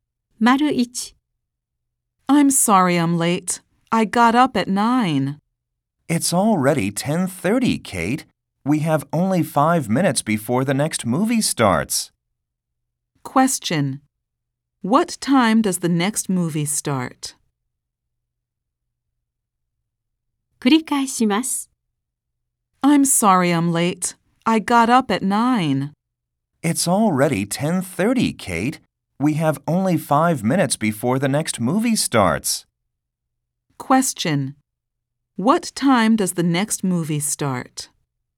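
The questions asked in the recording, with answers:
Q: What time does the next movie start?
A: At 10:35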